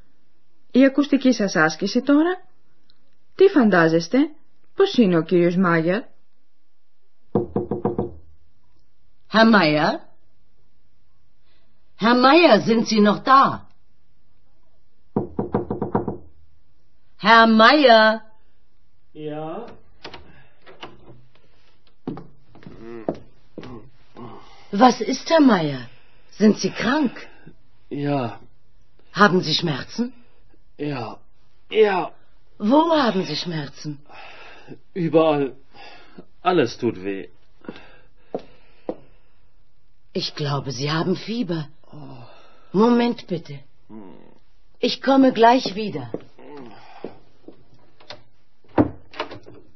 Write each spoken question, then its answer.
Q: Τι φαντάζεστε, πώς είναι ο κύριος Μάγερ.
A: Είναι άρρωστος.